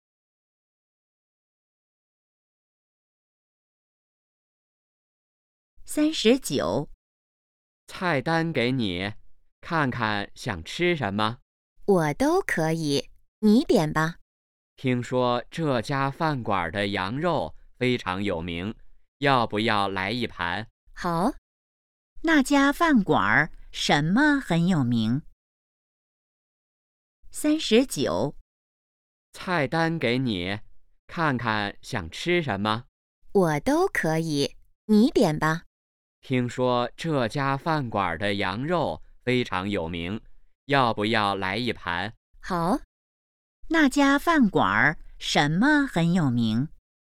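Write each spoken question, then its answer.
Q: 那家饭馆什么很有名?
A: 羊肉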